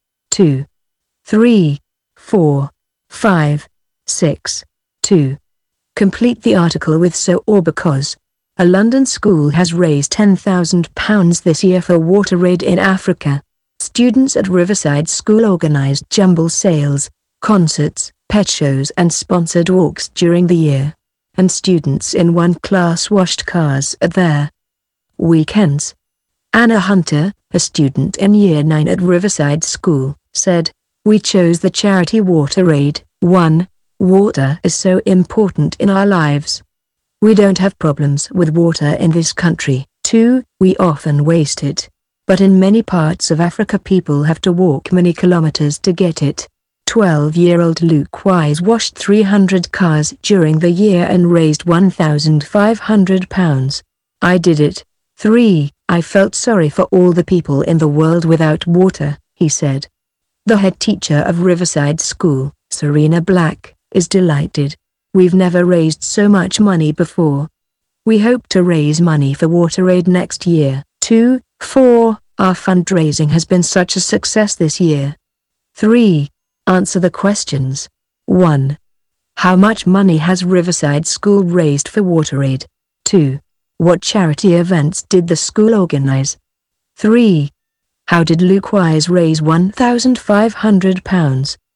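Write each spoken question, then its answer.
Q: How much money has Riverside School raised for Water Aid?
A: £10,000

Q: What charity events did the school organize?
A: Jumble sales, concerts, pet shows and sponsored walks

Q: How did Luke Wise raise £1,500?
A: He washed 300 cars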